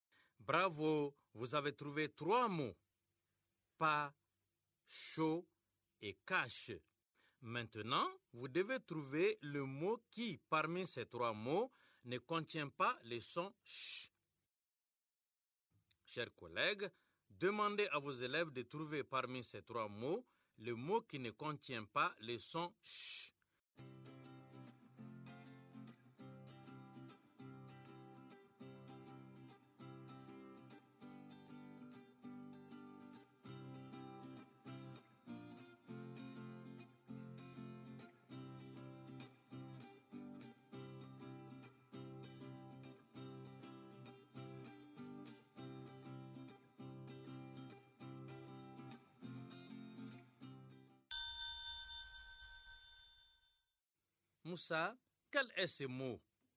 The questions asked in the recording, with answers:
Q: Moussa, quel est ce mot?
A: C'est le mot pas.